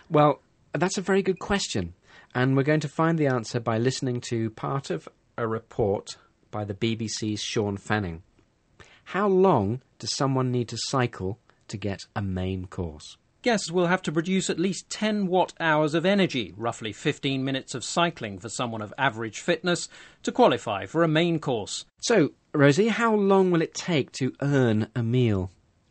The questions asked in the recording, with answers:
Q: How long does someone need to cycle to get a main course?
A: About 15 minutes, apparently.